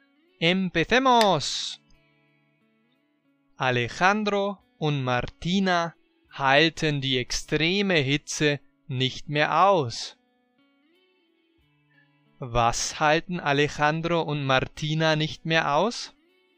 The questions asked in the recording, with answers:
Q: Was halten Alejandro und Martina nicht mehr aus?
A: Die extreme Hitze. Die Hitze halten sie nicht mehr aus.